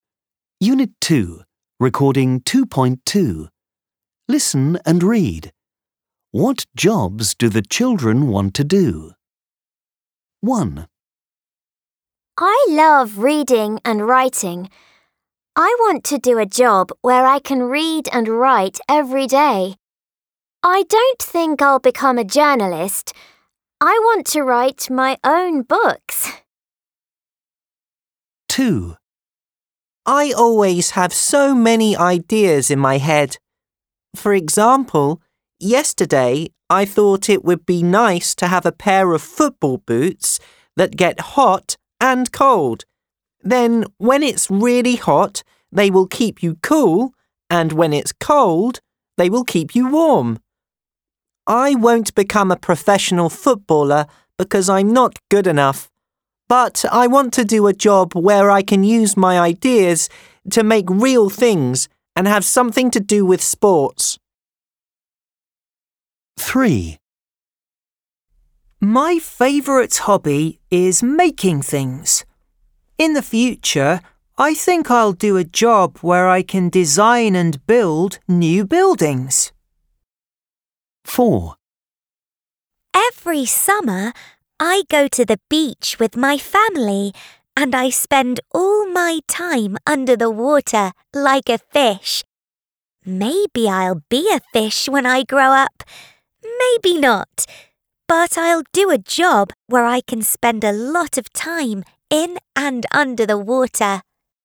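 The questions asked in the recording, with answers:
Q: What jobs do the children want to do?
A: A writer (author of books)

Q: What jobs do the children want to do?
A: An architect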